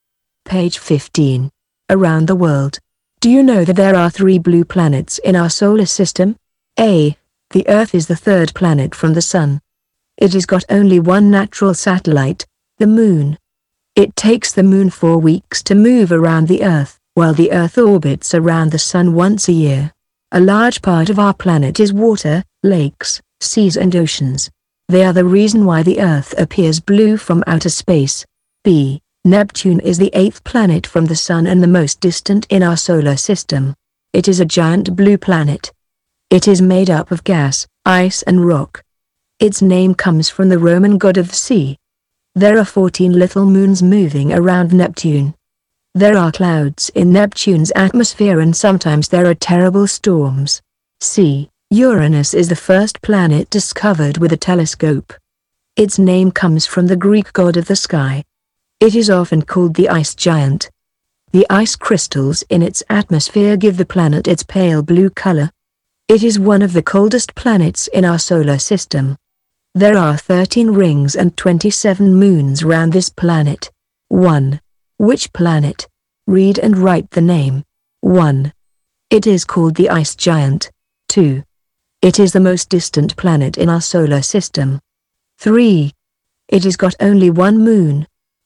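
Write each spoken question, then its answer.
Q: It is called the ice giant.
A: Uranus

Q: It is the most distant planet in our solar system.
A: Neptune

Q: It has got only one moon.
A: The Earth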